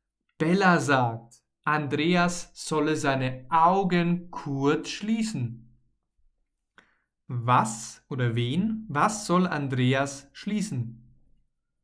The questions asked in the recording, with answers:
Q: Was soll Andreas schließen?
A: Seine Augen. Er soll seine Augen schließen, also zumachen.